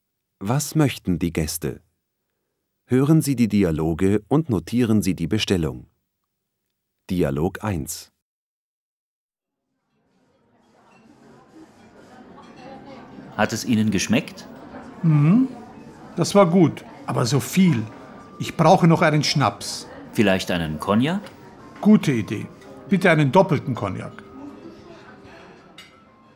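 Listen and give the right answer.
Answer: einen doppelten Cognac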